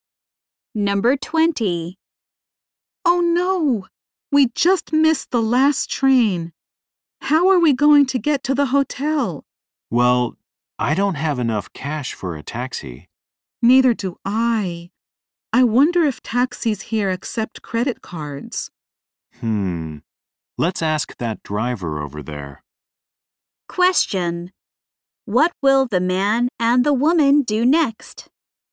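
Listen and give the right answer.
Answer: Ask a taxi driver if they accept credit cards.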